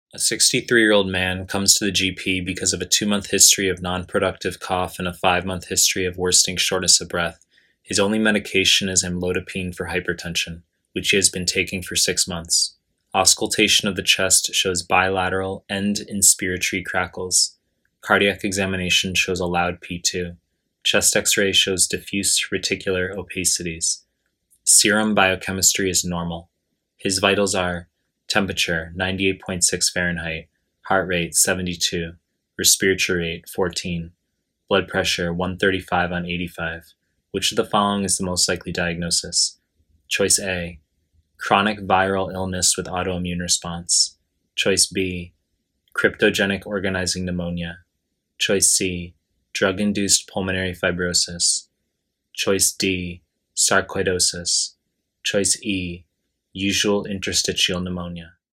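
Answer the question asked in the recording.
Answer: E: usual interstitial pneumonia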